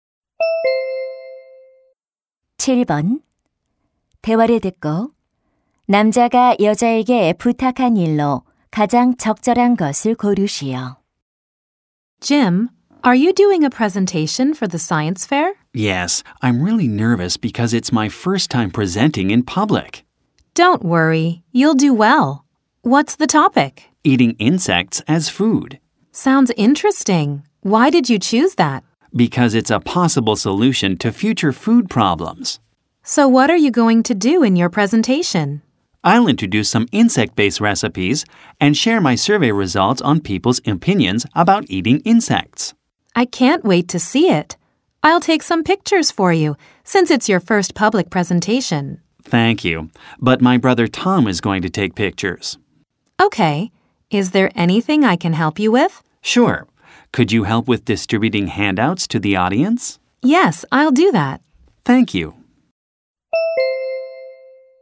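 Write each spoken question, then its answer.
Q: 대화를 듣고 남자가 여자에게 부탁한 일로 가장 적절한 것을 고르시오.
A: 청중에게 유인물 나눠 주기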